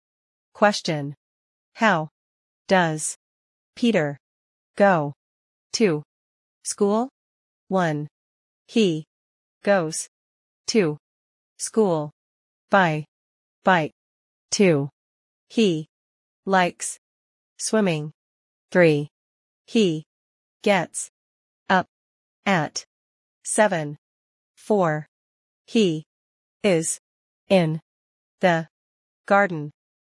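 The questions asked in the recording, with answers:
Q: How does Peter go to school?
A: 1: He goes to school by bike.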